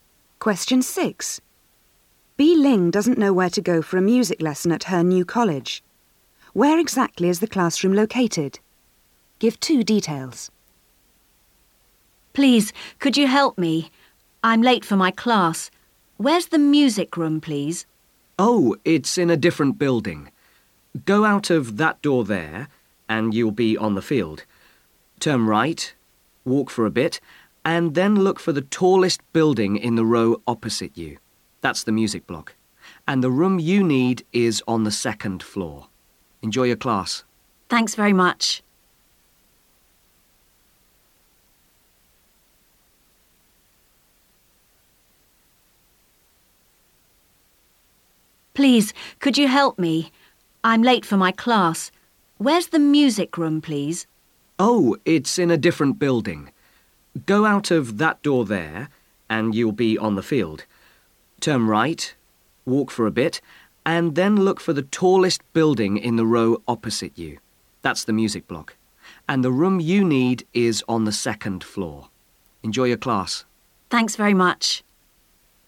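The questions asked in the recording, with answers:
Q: Where exactly is the classroom located?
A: In the tallest building (the music block) opposite, on the second floor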